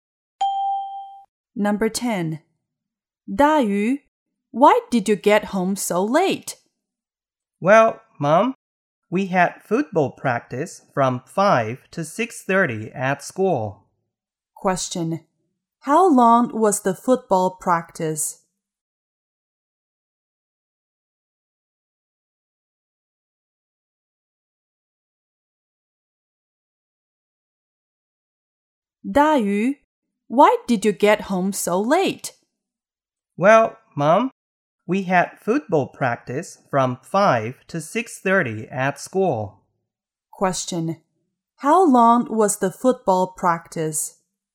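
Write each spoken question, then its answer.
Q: How long was the football practice?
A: One and a half hours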